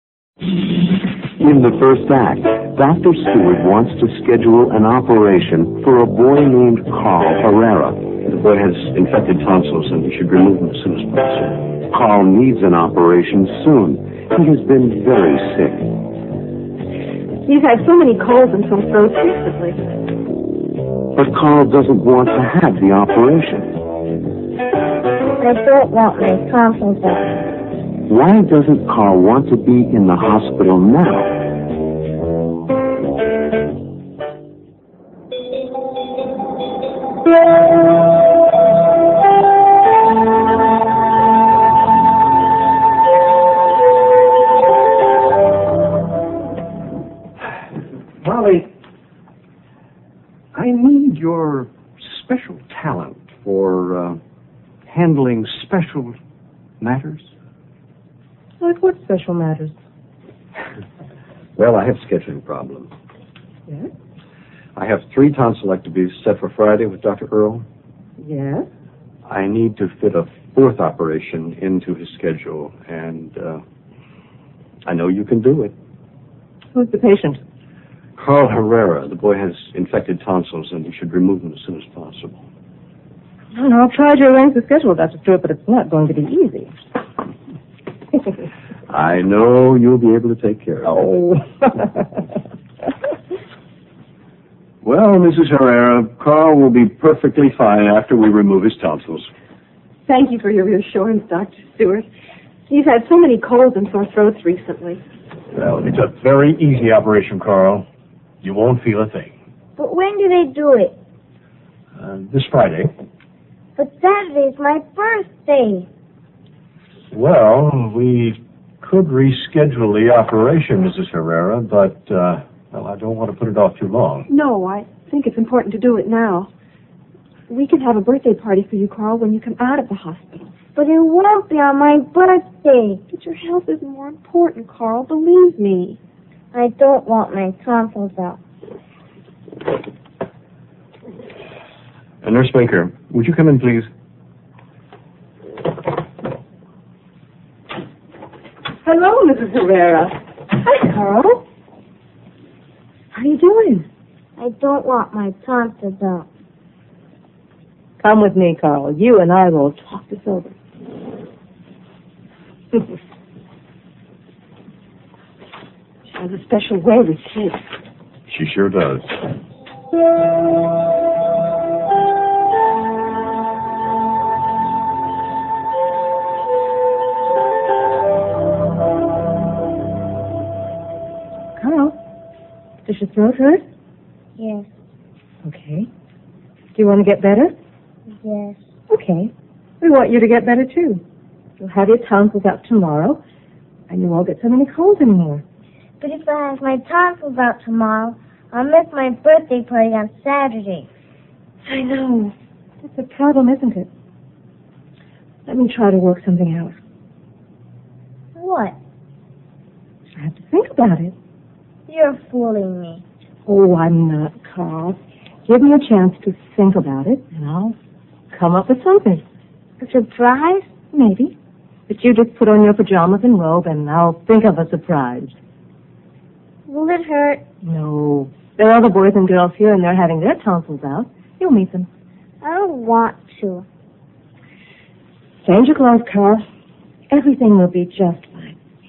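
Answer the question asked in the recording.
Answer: Because the operation is on Friday and he would miss his birthday party on Saturday.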